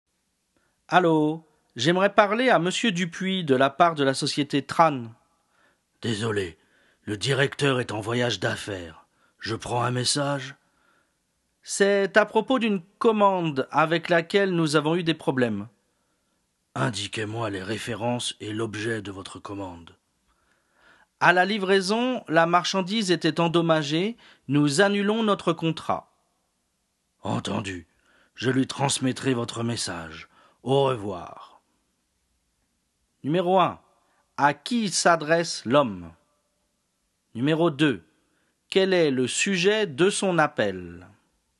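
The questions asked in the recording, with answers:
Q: Quel est le sujet de son appel?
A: Un problème avec une commande : la marchandise était endommagée, donc ils annulent le contrat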